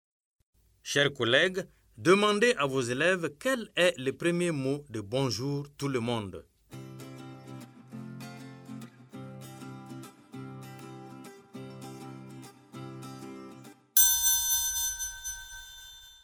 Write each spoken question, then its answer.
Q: Chers collègues, demandez à vos élèves quel est le premier mot de Bonjour tout le monde.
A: J'espère que vos élèves ont dit bonjour.